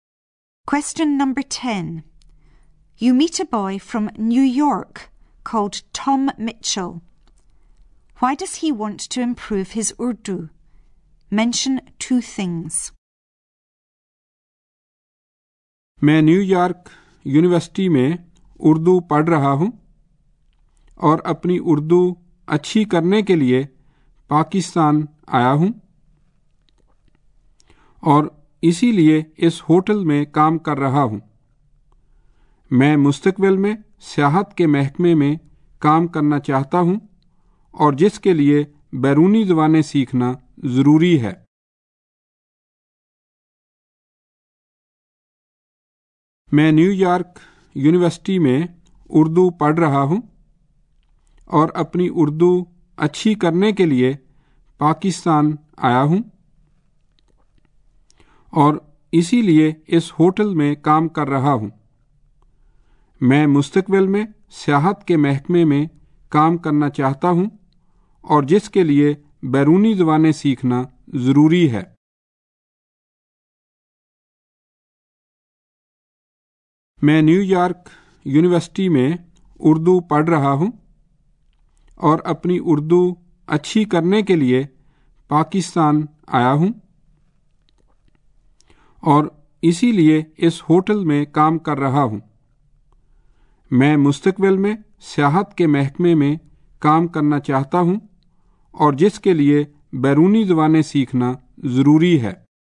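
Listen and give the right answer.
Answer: He studies Urdu at New York University; he wants to work in tourism in future, which needs foreign languages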